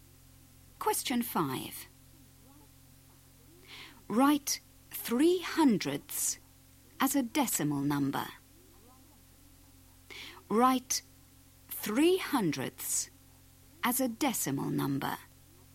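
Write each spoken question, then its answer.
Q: Write 3/100 as a decimal number.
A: 0.03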